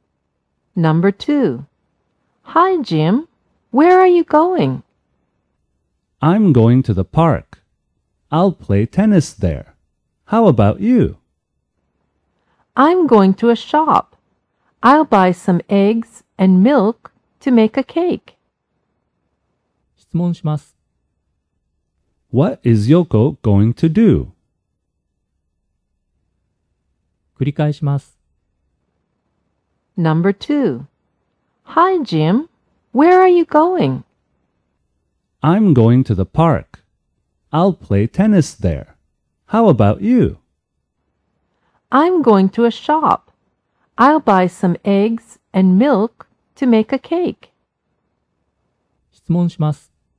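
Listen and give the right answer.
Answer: Buy eggs and milk to make a cake.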